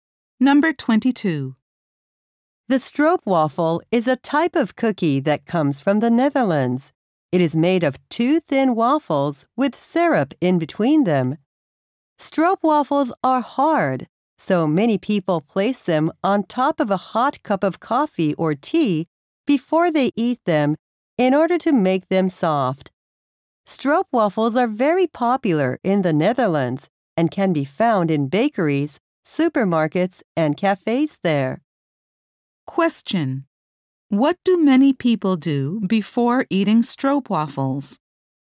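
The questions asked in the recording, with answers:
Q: What do many people do before eating stroopwafels?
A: They put them on top of a hot cup of coffee or tea.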